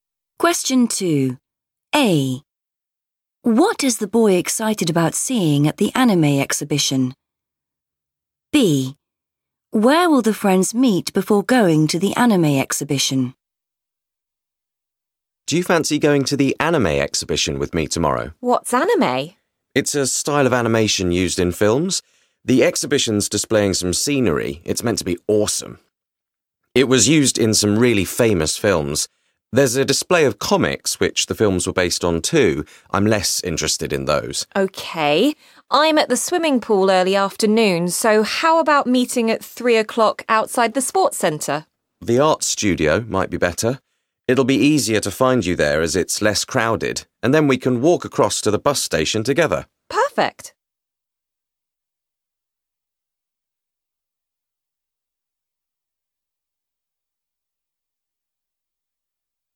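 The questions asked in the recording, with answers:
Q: What is the boy excited about seeing at the anime exhibition?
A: scenery

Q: Where will the friends meet before going to the anime exhibition?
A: the art studio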